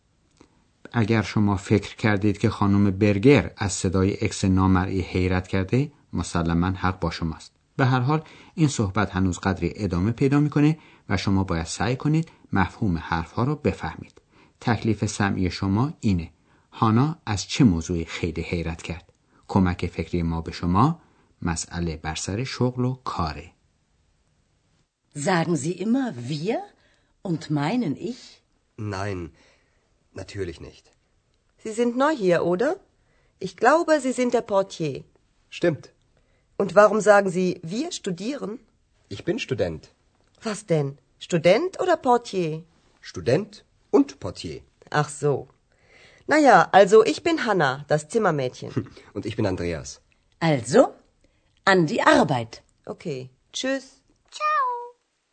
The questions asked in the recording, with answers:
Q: هانا از چه موضوعی خیلی حیرت کرد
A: هانا از این تعجب میکنه که آندراس میگه که دانشجوست چون قبلا حرف هانا رو تصدیق کرده و گفته بود که دربان یا بهتر بگیم کارمند قسمت پذیرش هتل.